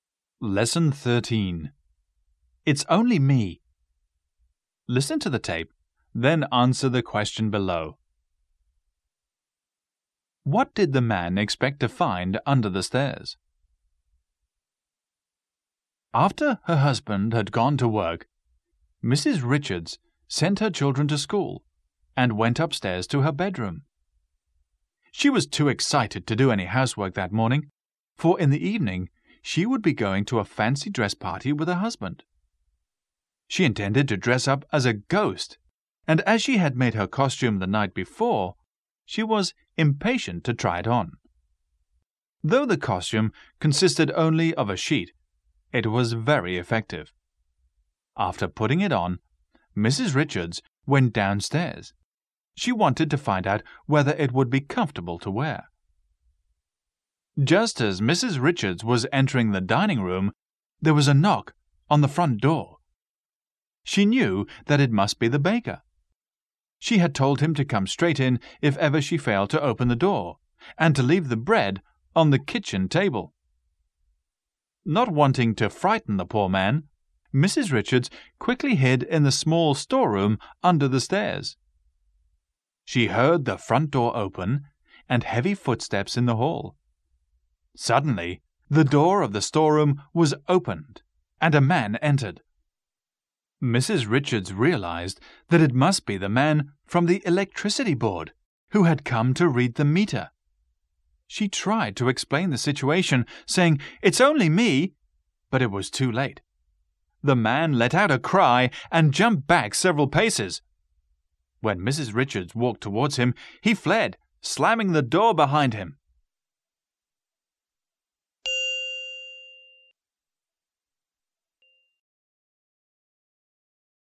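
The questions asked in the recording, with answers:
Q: What did the man expect to find under the stairs?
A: The electricity meter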